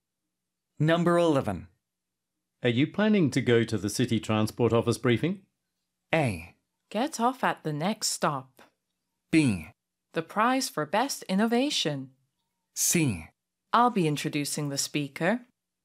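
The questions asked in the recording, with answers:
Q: Are you planning to go to the city transport office briefing?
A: C: I'll be introducing the speaker.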